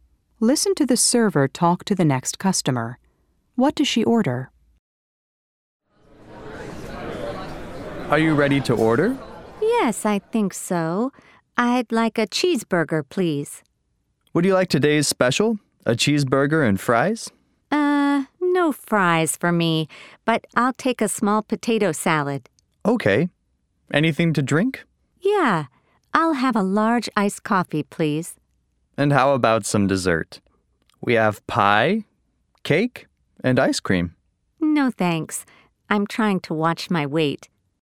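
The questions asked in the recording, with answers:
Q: What does she order?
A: A cheeseburger, a small potato salad, and a large iced coffee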